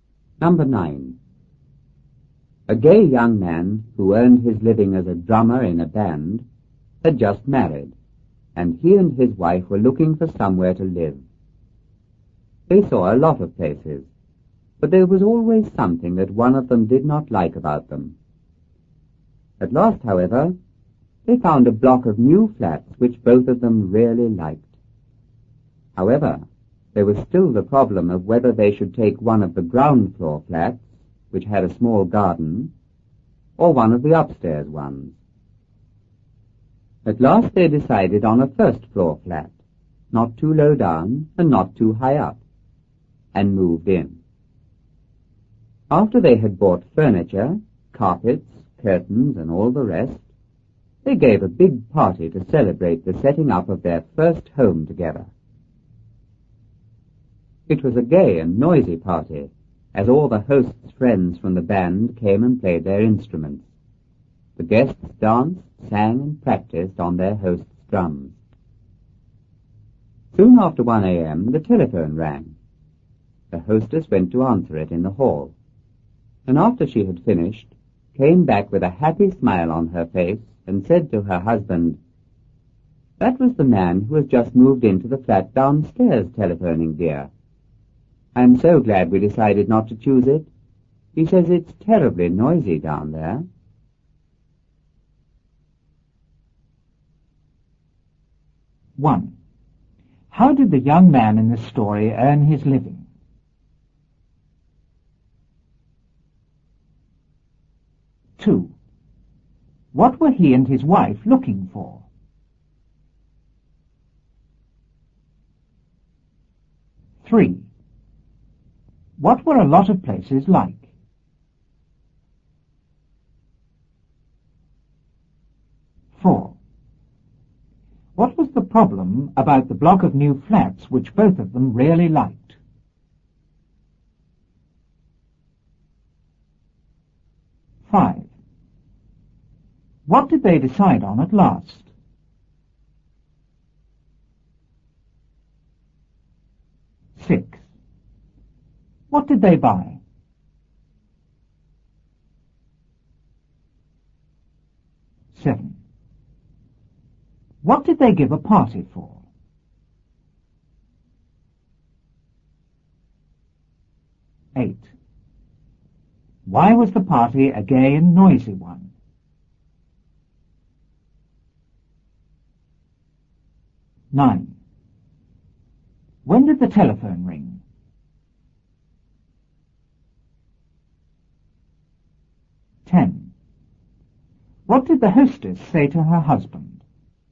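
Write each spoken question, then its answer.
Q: How did the young man in this story earn his living?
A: As a drummer in a band

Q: What were he and his wife looking for?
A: Somewhere to live

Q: What were a lot of places like?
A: There was always something one of them did not like

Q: What was the problem about the block of new flats which both of them really liked?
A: Whether to take a ground floor flat with a small garden or an upstairs one

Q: What did they decide on at last?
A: A first floor flat

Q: What did they buy?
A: Furniture, carpets, curtains and all the rest

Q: What did they give a party for?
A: To celebrate setting up their first home together

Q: Why was the party a gay and noisy one?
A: The host's friends from the band came and played their instruments

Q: When did the telephone ring?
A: Soon after 1 a.m.

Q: What did the hostess say to her husband?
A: That the man downstairs phoned saying it's terribly noisy there, and she was glad they didn't choose that flat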